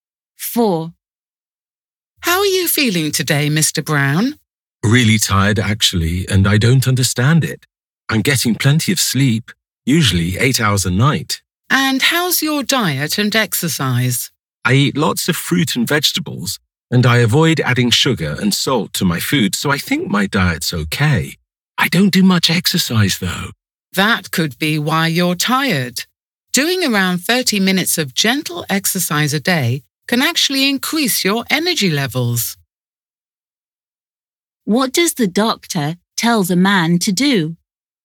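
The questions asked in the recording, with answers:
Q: What does the doctor tell the man to do?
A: do around 30 minutes of gentle exercise a day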